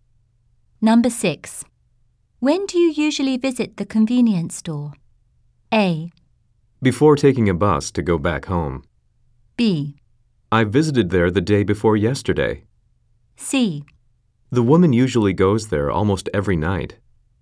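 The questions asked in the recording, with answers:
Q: When do you usually visit the convenience store?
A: A: Before taking a bus to go back home.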